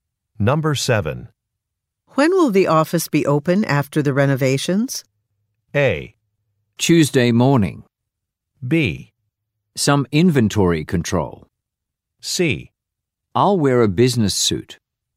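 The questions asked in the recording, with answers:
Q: When will the office be open after the renovations?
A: A: Tuesday morning.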